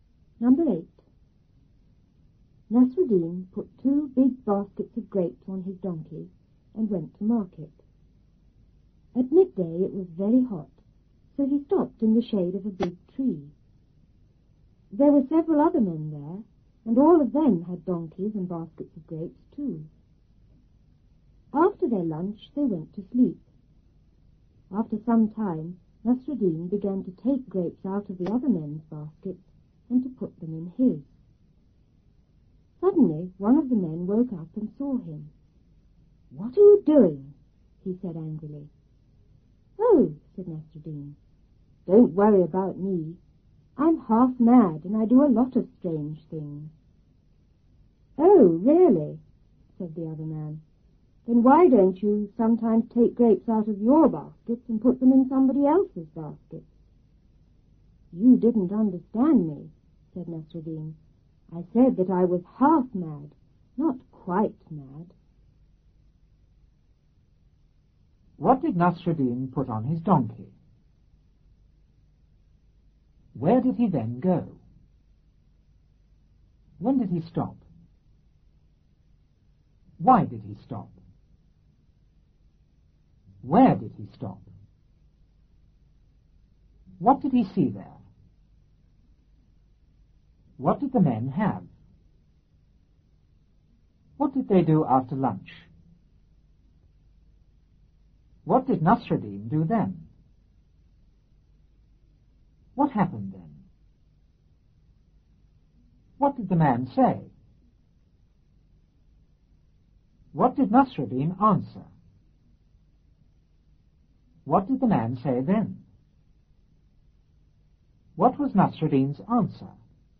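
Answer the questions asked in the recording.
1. 2 big baskets of grapes
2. To market
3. At midday
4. It was very hot
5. In the shade of a big tree
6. Several other men
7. Donkeys and baskets of grapes
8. They went to sleep
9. Took grapes from the other men's baskets and put them in his
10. One of the men woke up and saw him
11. "What are you doing?"
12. Don't worry, I'm half mad and do strange things
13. Why don't you sometimes put your grapes in somebody else's basket?
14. He said he was half mad, not quite mad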